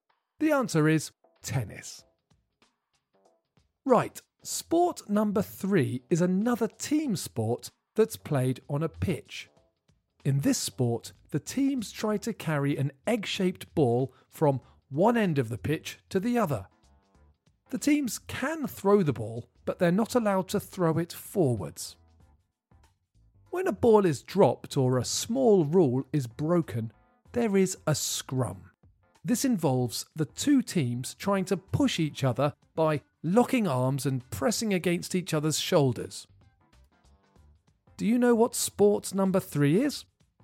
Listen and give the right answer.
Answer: The answer is rugby.